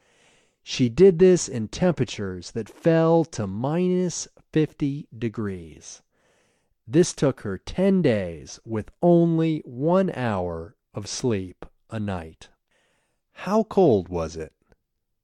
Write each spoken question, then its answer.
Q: How cold was it?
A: It was minus 50 degrees.